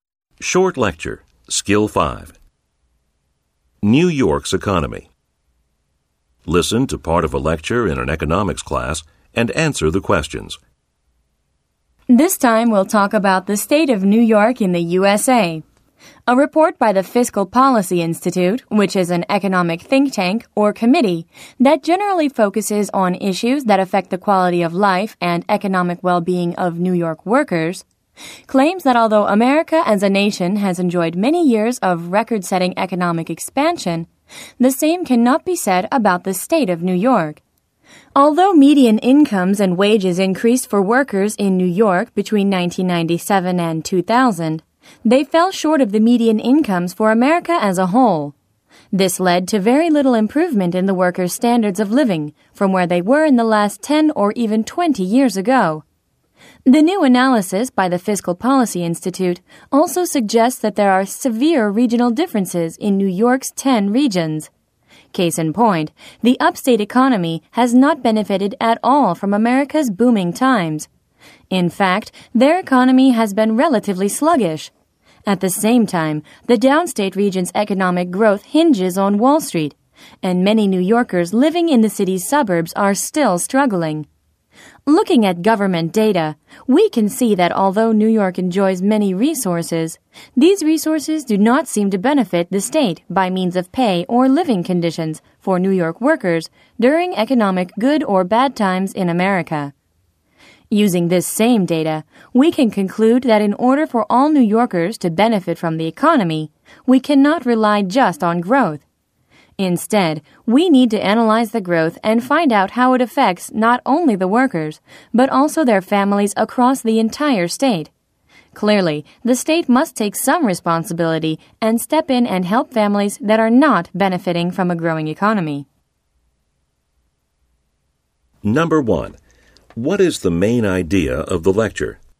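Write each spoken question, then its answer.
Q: What is the main idea of the lecture?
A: New York's economy and its workers have not benefited from America's economic expansion the way the rest of the nation has.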